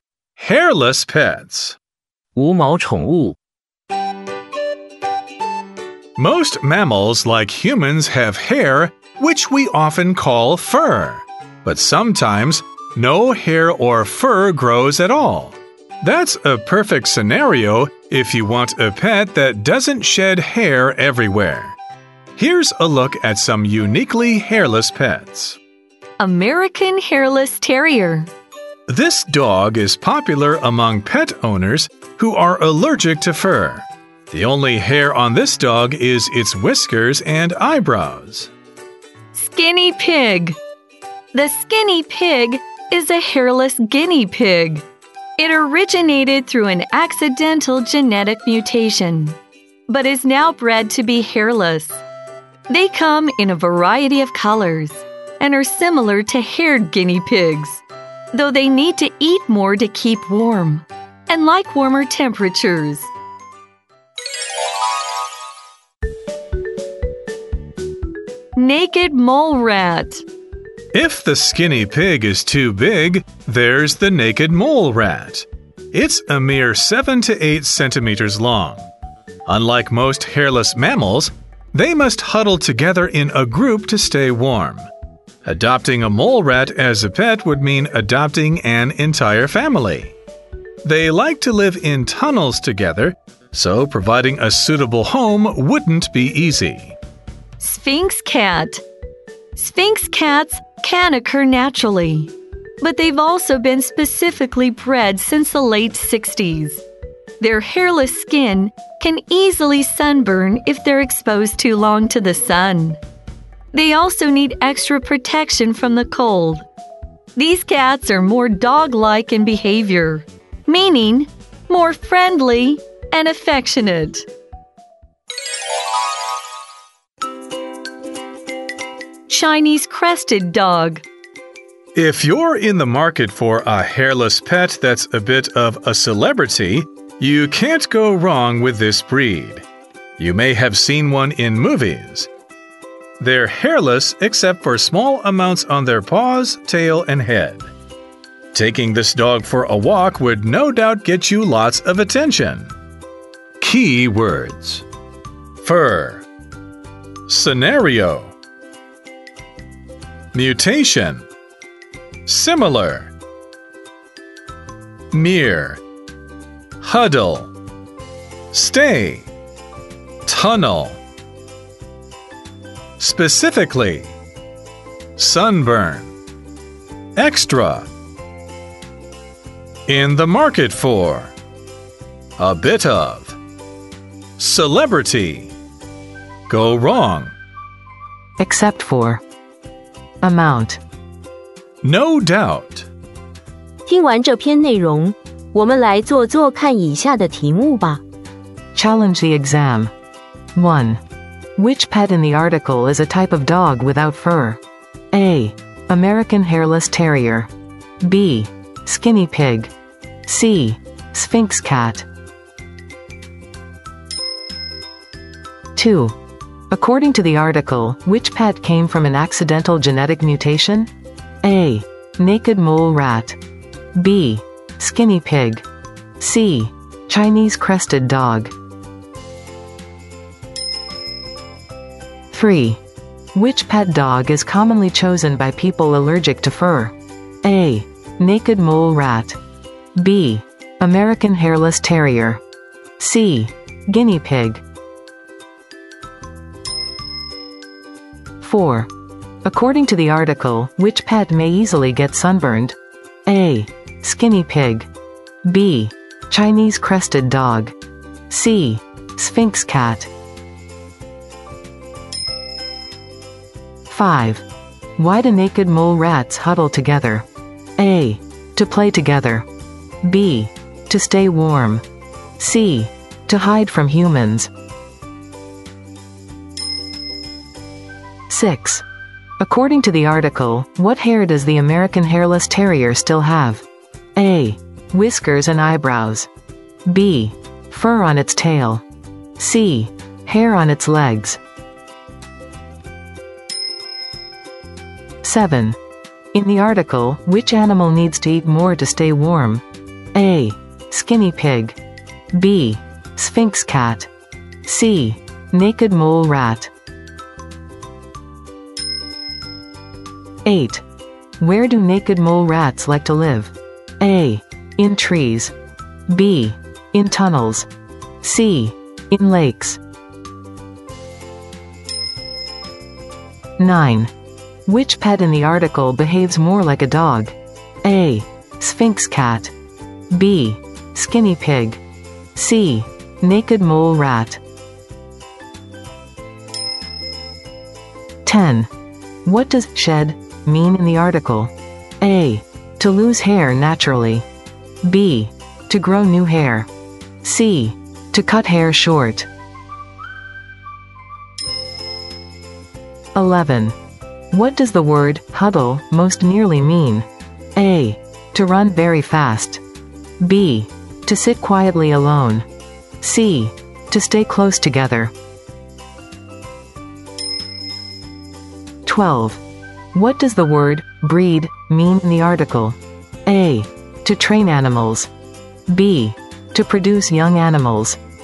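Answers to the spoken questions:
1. A: American Hairless Terrier
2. B: Skinny Pig
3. B: American Hairless Terrier
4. C: Sphinx Cat
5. B: To stay warm
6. A: Whiskers and eyebrows
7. A: Skinny pig
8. B: In tunnels
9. A: Sphinx cat
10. A: To lose hair naturally
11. C: To stay close together
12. B: To produce young animals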